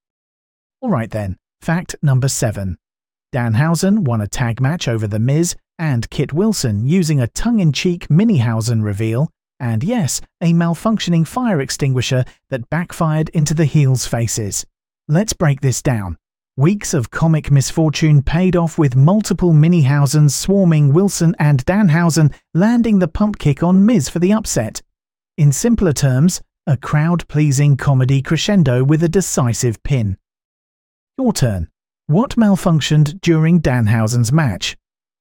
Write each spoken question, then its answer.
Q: What malfunctioned during Danhausen's match?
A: Correct answer. A fire extinguisher.